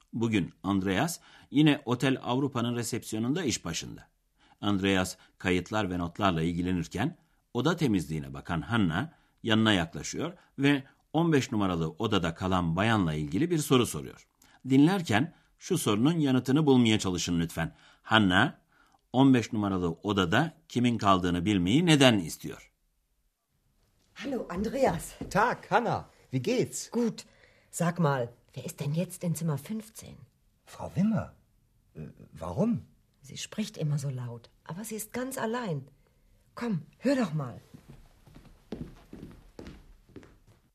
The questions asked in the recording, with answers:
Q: Hanna 15 numaralı odada kimin kaldığını bilmeyi neden istiyor?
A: Hanna 15 numarada kimin kaldığını öğrenmek istiyor. Çünkü 15 numaralı odada bir bayanın sürekli olarak yüksek sesle konuştuğunu duymuş.